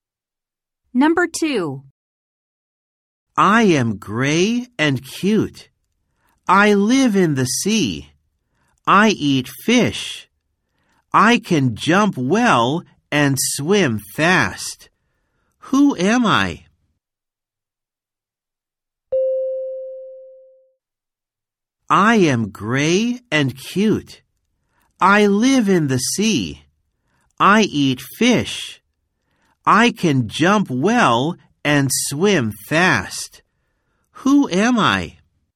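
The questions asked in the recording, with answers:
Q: Who am I?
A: a dolphin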